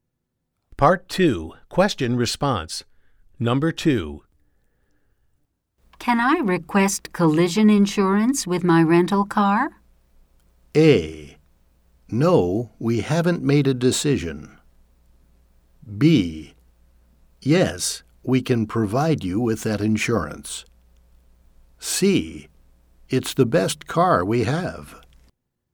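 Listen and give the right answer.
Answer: B: Yes, we can provide you with that insurance.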